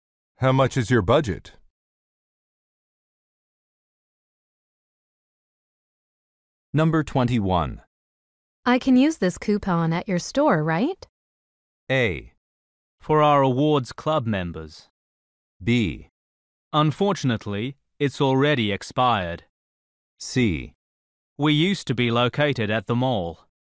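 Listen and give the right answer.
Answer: B: Unfortunately, it's already expired.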